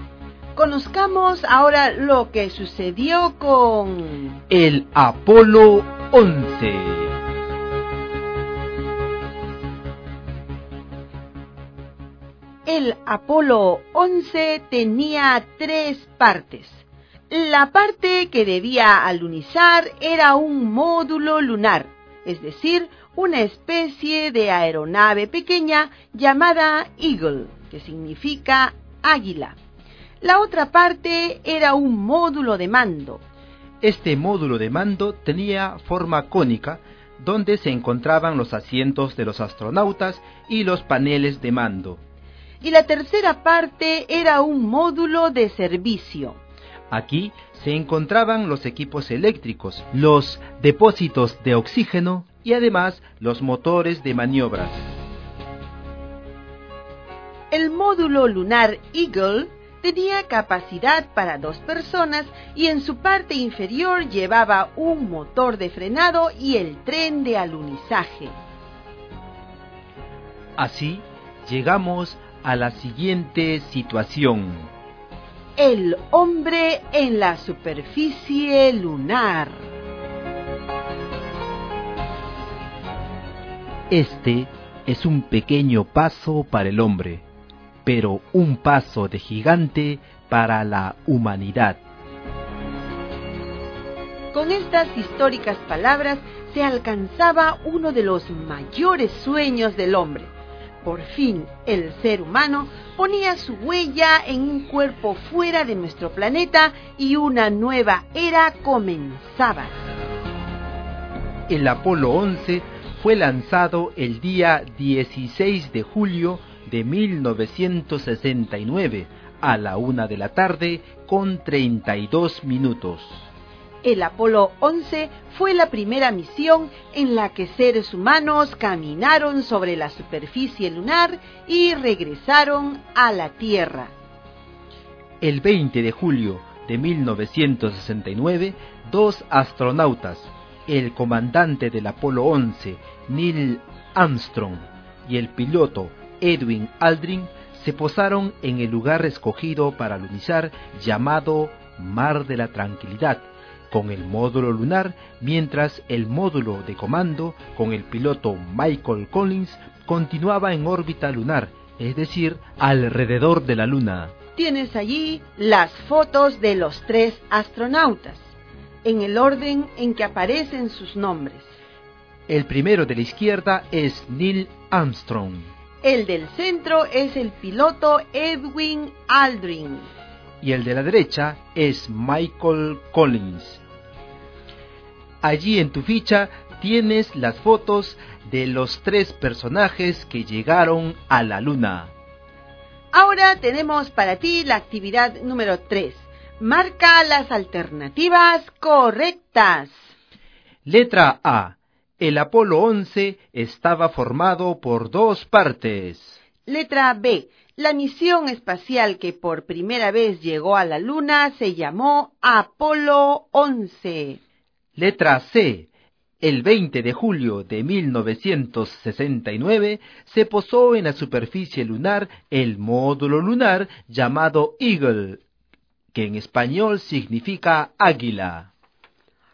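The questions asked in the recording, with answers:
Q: Marca las alternativas correctas.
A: B: La misión espacial que por primera vez llegó a la Luna se llamó Apolo 11; C: El 20 de julio de 1969 se posó en la superficie lunar el módulo lunar llamado Eagle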